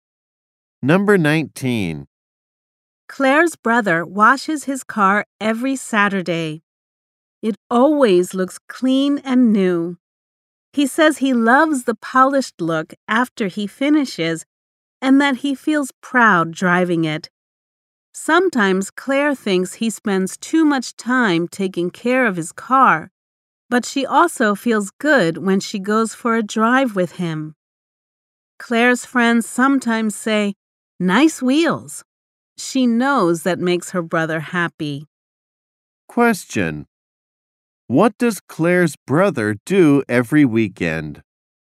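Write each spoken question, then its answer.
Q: Question: What does Claire's brother do every weekend?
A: He washes his car.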